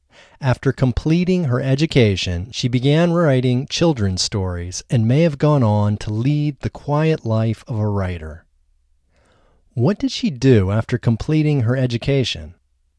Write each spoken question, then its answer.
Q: What did she do after completing her education?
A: After completing her education, she began writing children's stories.